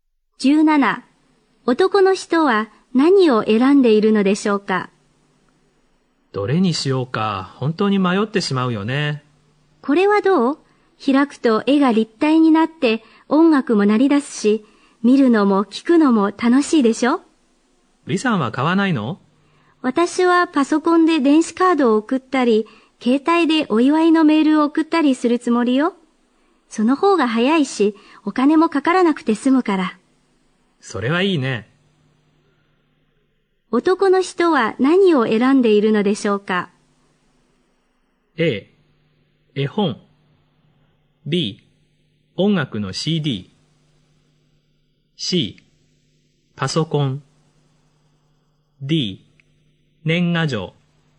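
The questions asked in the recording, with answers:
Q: 男の人は何を選んでいるのでしょうか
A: D: 年賀状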